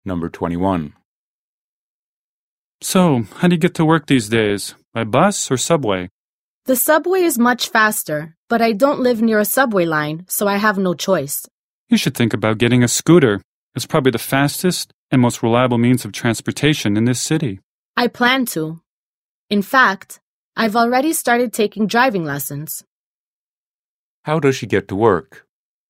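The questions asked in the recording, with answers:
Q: How does she get to work?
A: By bus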